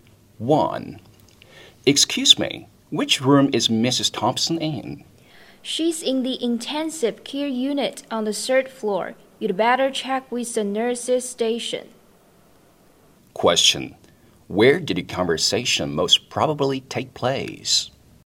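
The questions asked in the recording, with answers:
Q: Where did the conversation most probably take place?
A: In a hospital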